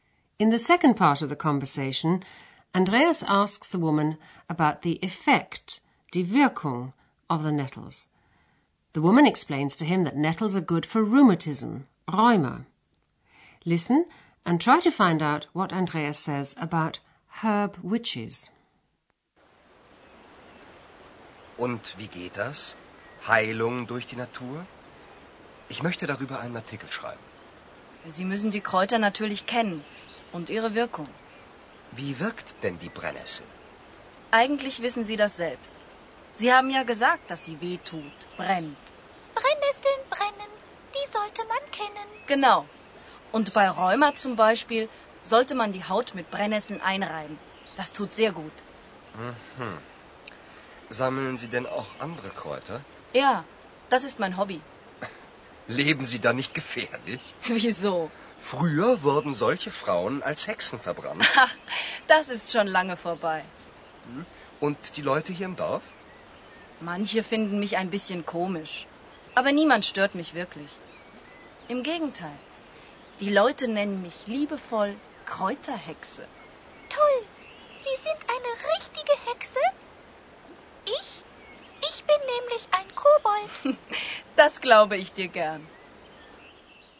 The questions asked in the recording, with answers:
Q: Listen and try to find out what Andreas says about herb witches.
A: Andreas says that in the past, women who collected herbs were burned as witches because people believed that they possessed magic powers.